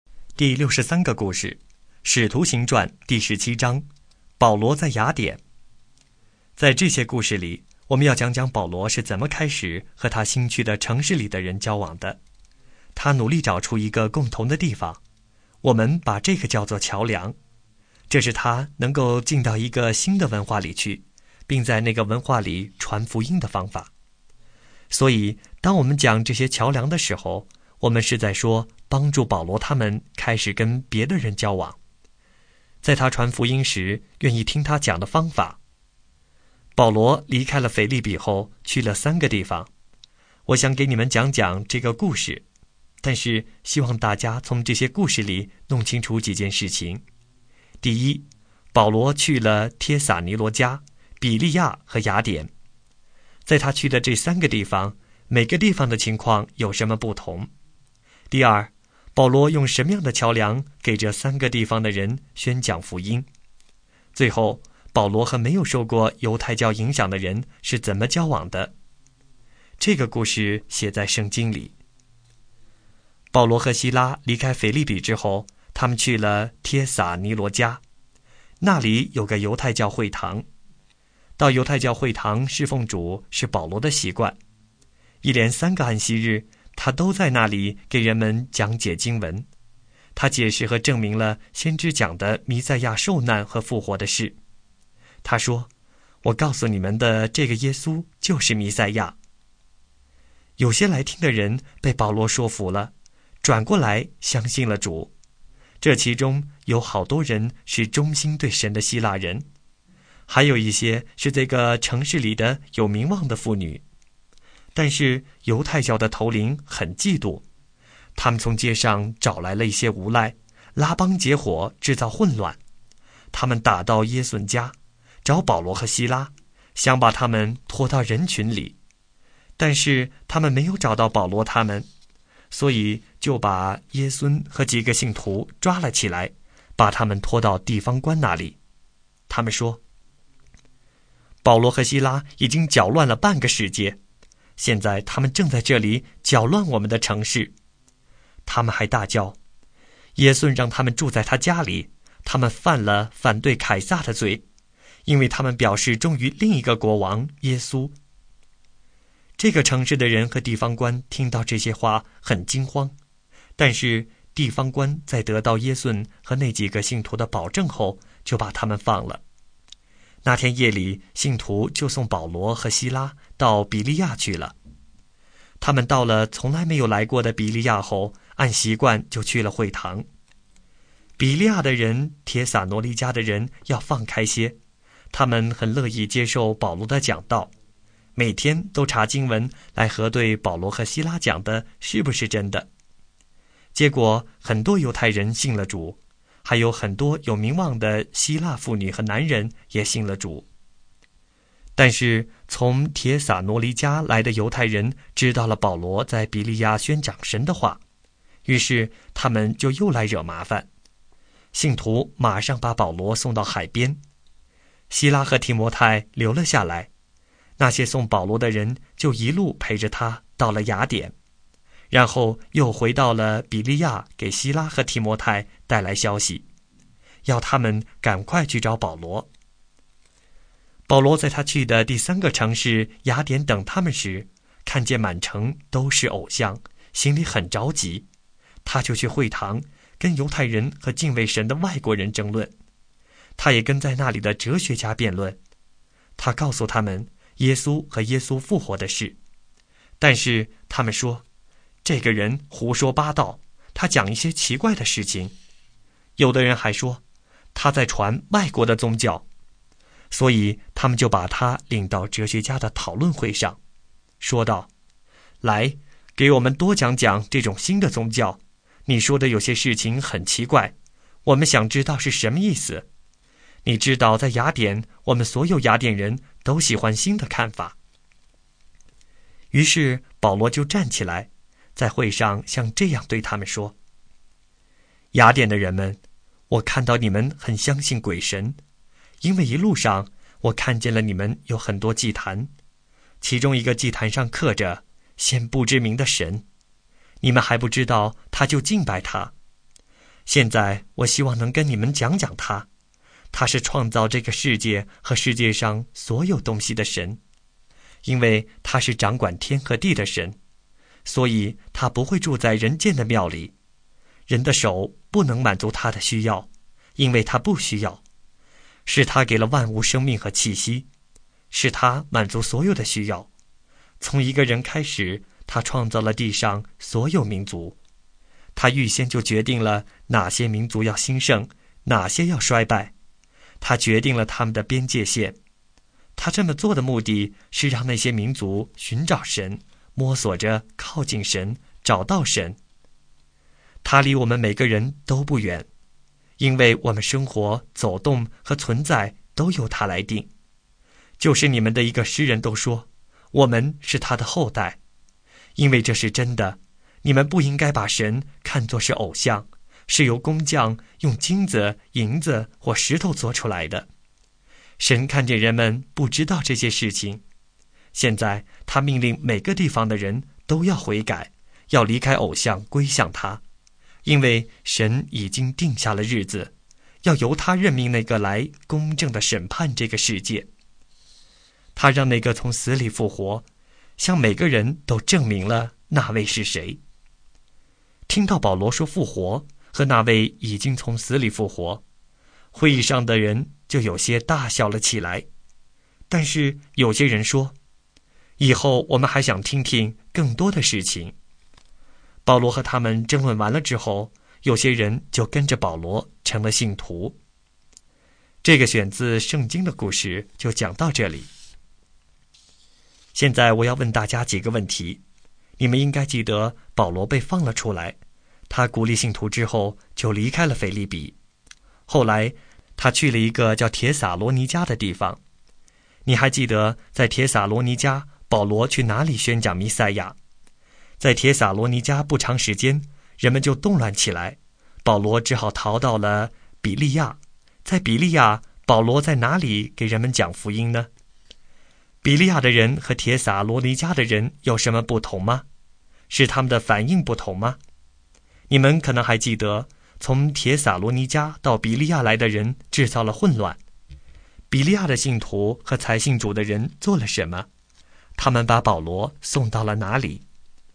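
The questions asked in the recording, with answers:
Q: 你还记得在帖撒罗尼迦保罗去哪里宣讲弥赛亚?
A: 犹太教会堂

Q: 在比利亚,保罗在哪里给人们讲福音呢?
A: 会堂

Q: 比利亚的人和帖撒罗尼迦的人有什么不同吗?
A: 比利亚的人更放开,乐意接受保罗的讲道,每天查经文核对

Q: 比利亚的信徒和才信主的人做了什么?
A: 马上把保罗送到海边,陪他到雅典

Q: 他们把保罗送到了哪里?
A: 雅典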